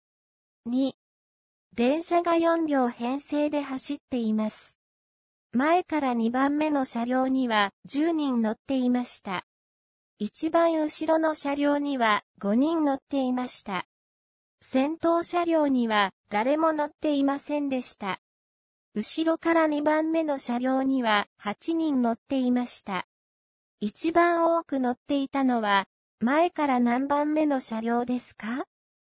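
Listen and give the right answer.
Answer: 前から2番目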